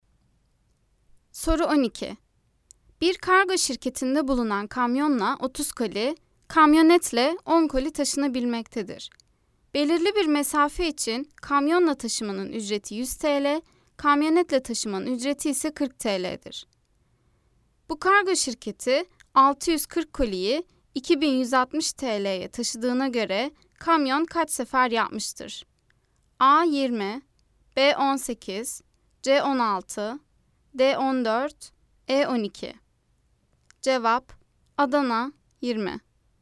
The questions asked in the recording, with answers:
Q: Bu kargo şirketi 640 koliyi 2160 TL'ye taşıdığına göre kamyon kaç sefer yapmıştır?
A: Cevap: Adana 20.